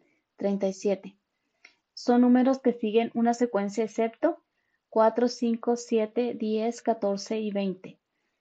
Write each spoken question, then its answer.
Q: 37 son números que siguen una secuencia excepto 4, 5, 7, 10, 14 y 20.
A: Y la respuesta correcta es la de 20.